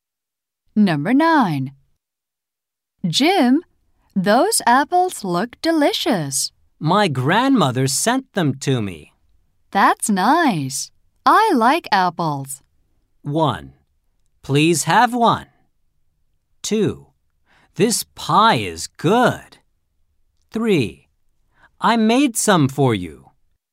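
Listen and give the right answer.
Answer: 1: Please have one.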